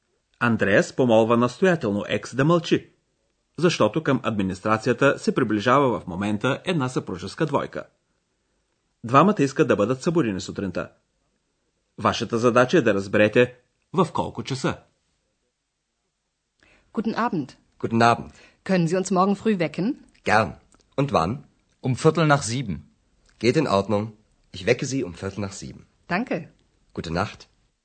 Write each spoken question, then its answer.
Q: Вашата задача е да разберете в колко часа.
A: Мъжът и жената искат да бъдат събудени в 7 часа. По-точно, в 7 часа и четвърт.